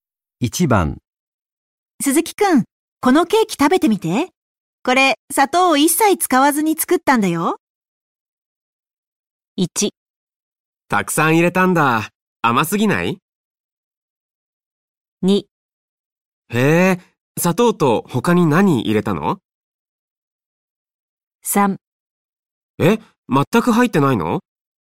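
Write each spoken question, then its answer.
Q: 鈴木くん、このケーキ食べてみて。これ、砂糖を一切使わずに作ったんだよ。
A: 3: え、全く入ってないの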